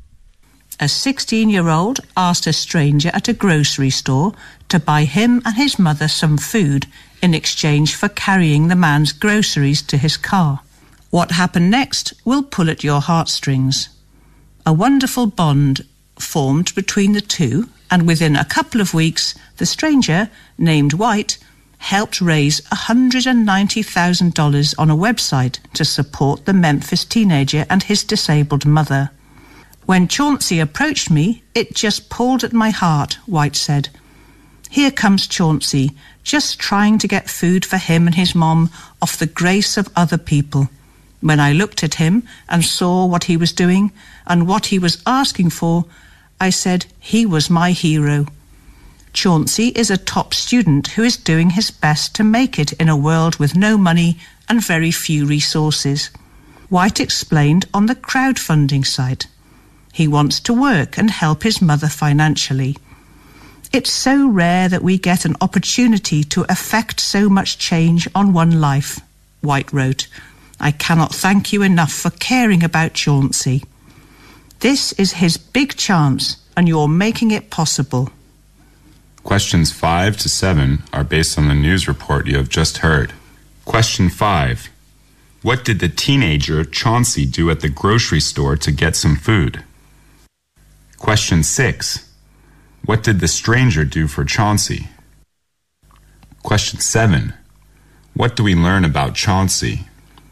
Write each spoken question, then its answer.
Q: What did the teenager Chauncey do at the grocery store to get some food?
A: He asked a stranger for help by sending the groceries of the stranger to his or her car, and then in exchange for some food.

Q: What did the stranger do for Chauncey?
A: Go to a crowdfunding website and raised $190,000 for Chauncey and his mother.

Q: What do we learn about Chauncey?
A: Chauncey is a 16-year-old boy from Memphis, and he is a top student in school.